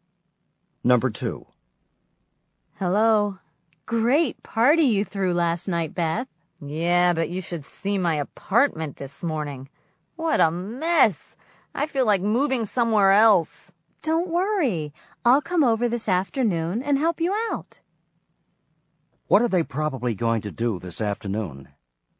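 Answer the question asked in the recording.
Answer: Clean up Beth's apartment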